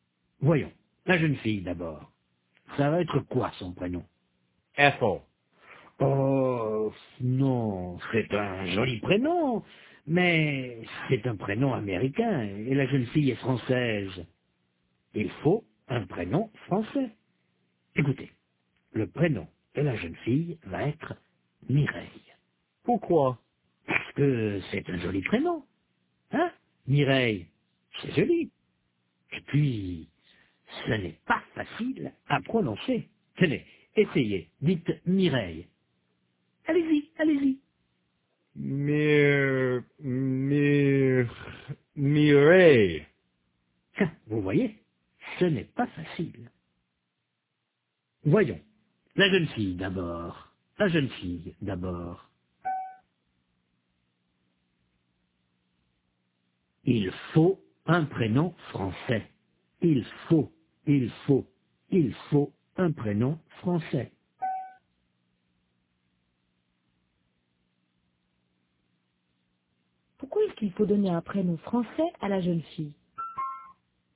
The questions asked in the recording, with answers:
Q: Pourquoi est-ce qu'il faut donner un prénom français à la jeune fille?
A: Parce qu'elle est française.